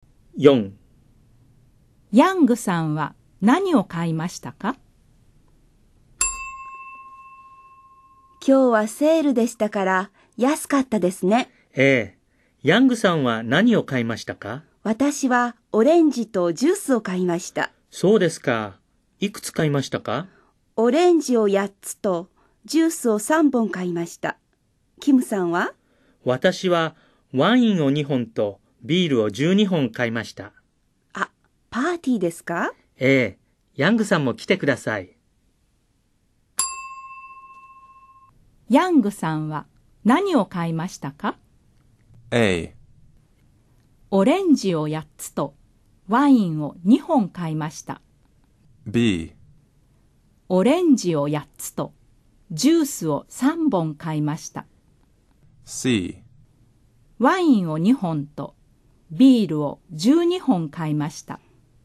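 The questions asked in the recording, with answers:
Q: ヤングさんは何を買いましたか?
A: B: オレンジを8つとジュースを3本買いました。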